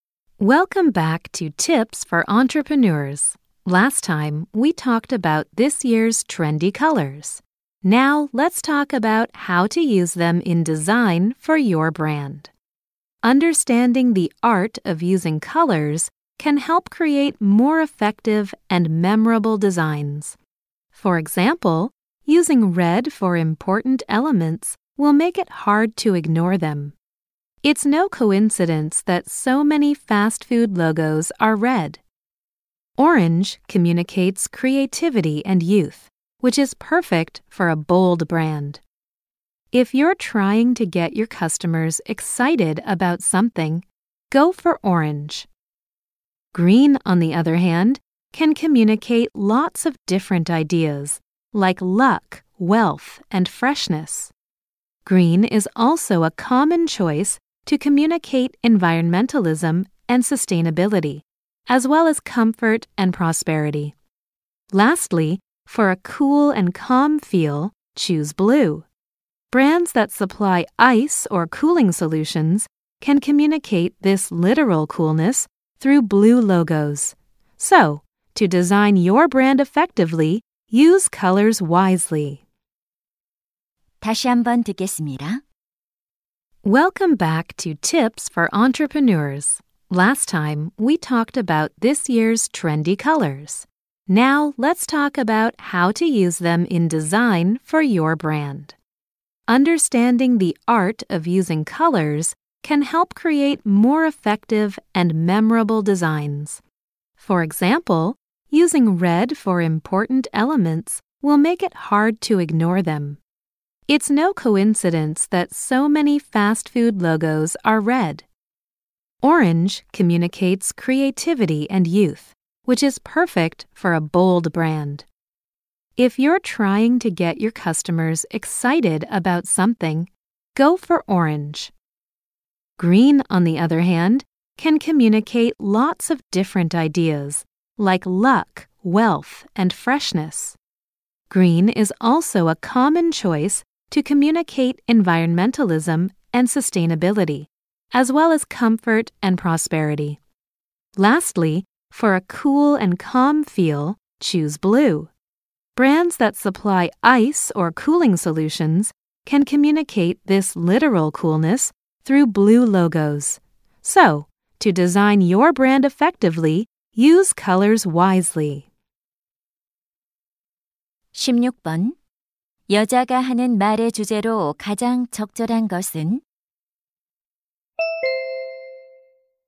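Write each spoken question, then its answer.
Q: 여자가 하는 말의 주제로 가장 적절한 것은?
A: 브랜드 디자인에서 색깔을 효과적으로 사용하는 방법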